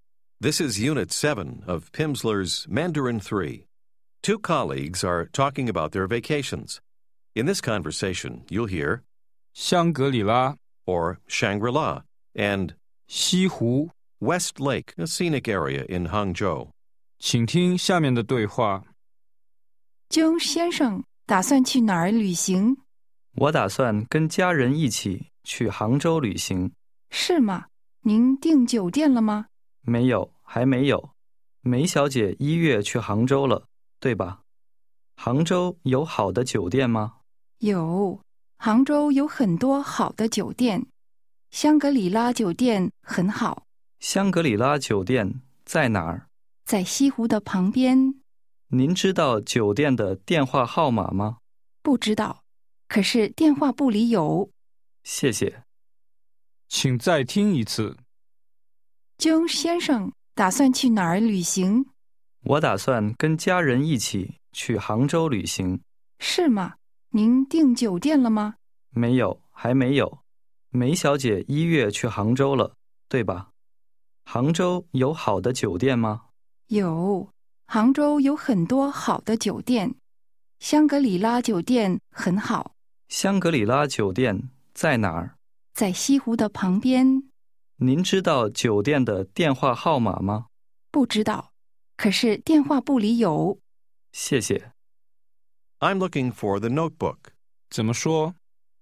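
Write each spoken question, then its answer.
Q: 江先生打算去哪儿旅行?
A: 杭州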